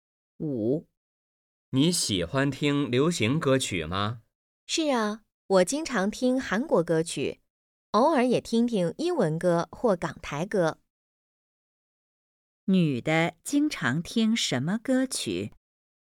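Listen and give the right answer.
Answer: 韩国歌曲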